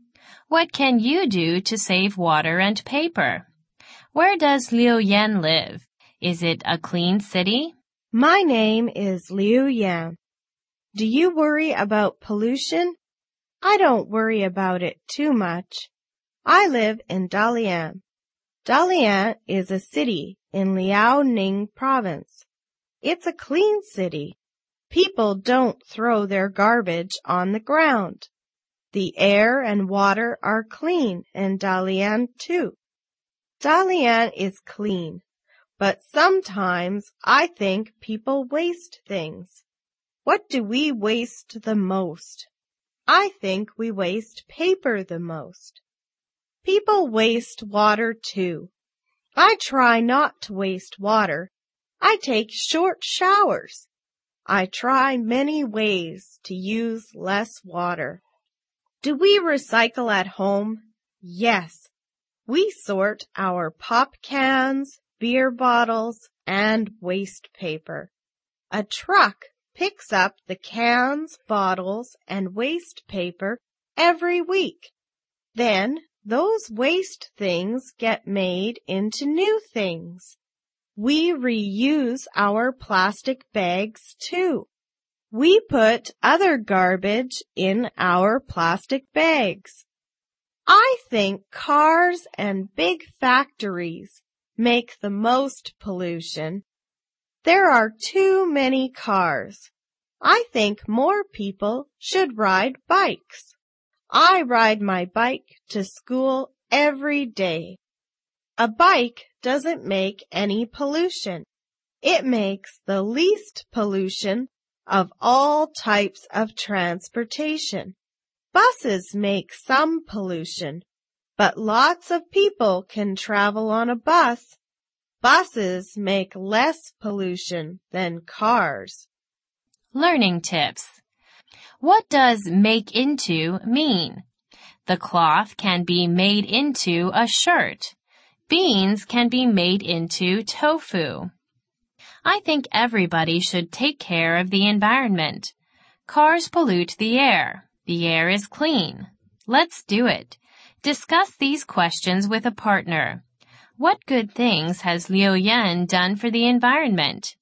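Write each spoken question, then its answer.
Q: Where does Liu Yan live?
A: In Dalian, Liaoning province

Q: Is it a clean city?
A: Yes, it's a clean city

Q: What good things has Liu Yan done for the environment?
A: Takes short showers, recycles, reuses plastic bags, rides a bike to school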